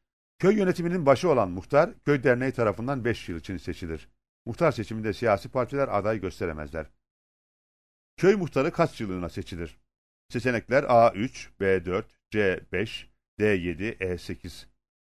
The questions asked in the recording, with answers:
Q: Köy muhtarı kaç yıllığına seçilir?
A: Doğru cevap C seçeneğidir.